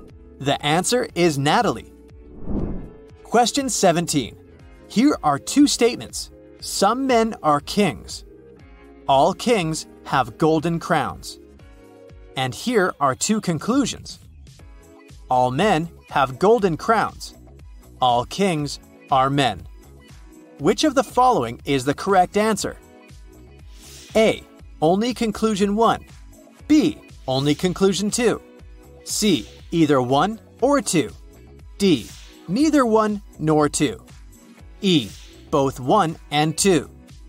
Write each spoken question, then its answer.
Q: Which of the following is the correct answer?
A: The correct answer is D.